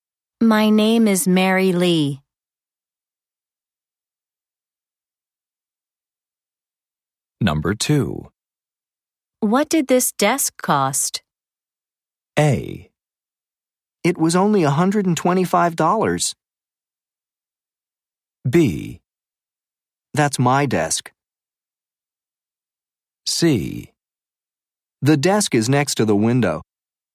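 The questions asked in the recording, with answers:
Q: What did this desk cost?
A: A: It was only $125.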